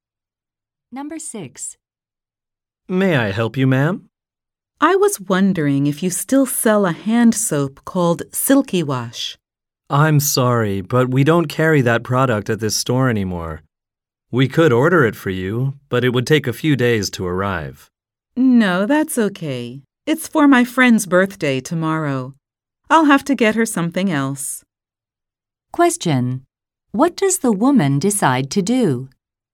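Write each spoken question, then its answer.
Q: What does the woman decide to do?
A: Get her friend a different present.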